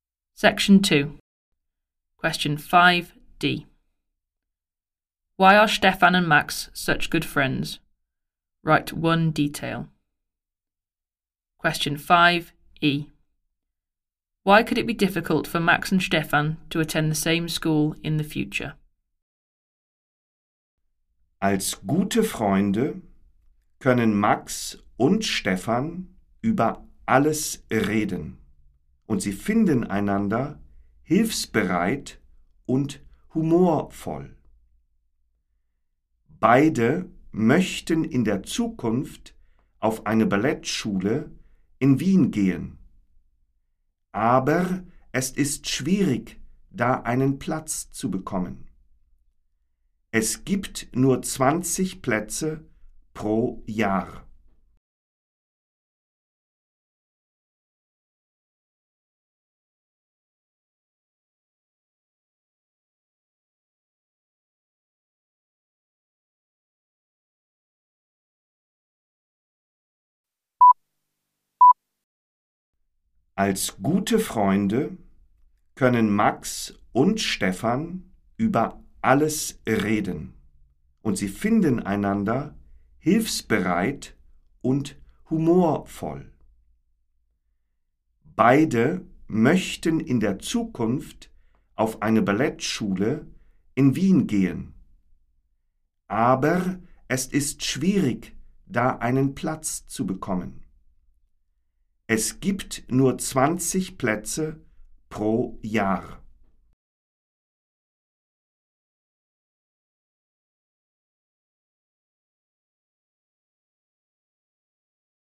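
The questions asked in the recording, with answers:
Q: Why are Stefan and Max such good friends?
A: They can talk about everything; helpful and humorous

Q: Why could it be difficult for Max and Stefan to attend the same school in the future?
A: Only 20 places per year at the ballet school in Vienna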